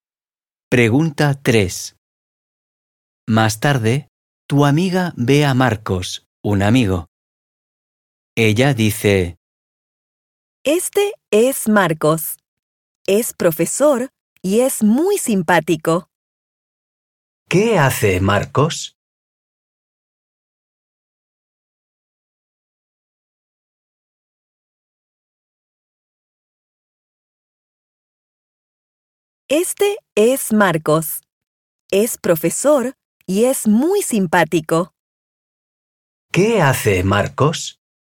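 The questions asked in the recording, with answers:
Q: ¿Qué hace Marcos?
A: es profesor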